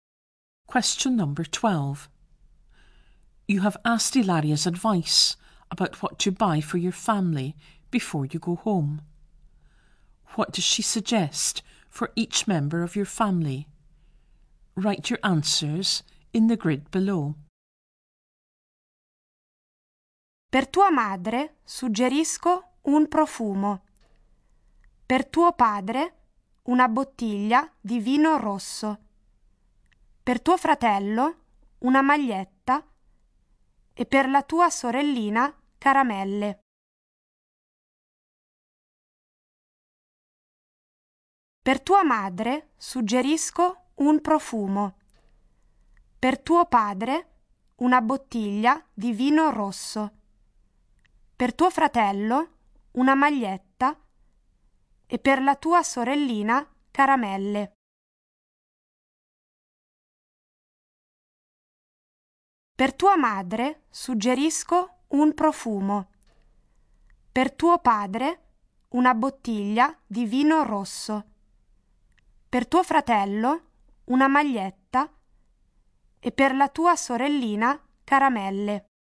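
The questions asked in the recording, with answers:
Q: What does she suggest for each member of your family?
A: Mother: perfume; father: a bottle of red wine; brother: a T-shirt; little sister: sweets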